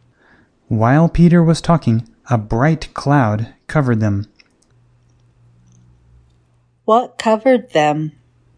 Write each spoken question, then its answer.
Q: What covered them?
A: A cloud covered them.